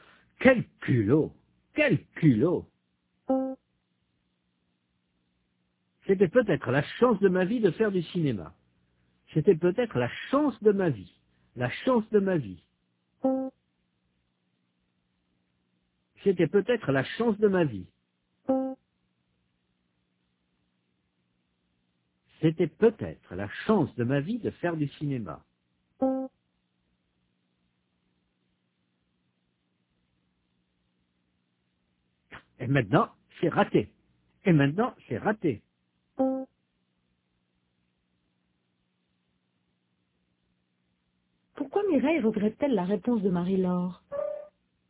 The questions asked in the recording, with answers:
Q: Pourquoi Mireille regrette-t-elle la réponse de Marie-Laure?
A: Parce que c'était peut-être la chance de sa vie de faire du cinéma.